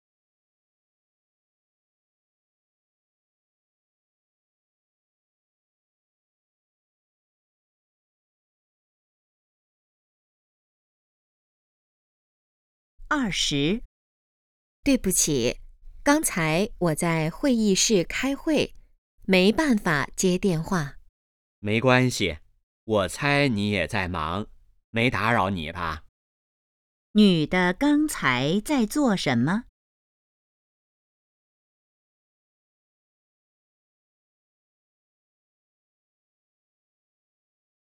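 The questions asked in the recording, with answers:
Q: 女的刚才在做什么?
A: 开会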